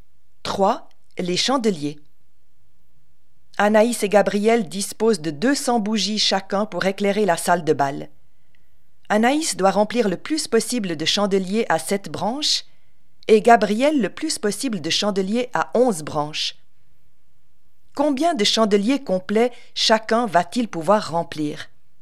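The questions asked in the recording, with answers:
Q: Combien de chandeliers complets chacun va-t-il pouvoir remplir ?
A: Anaïs 28, Gabriel 18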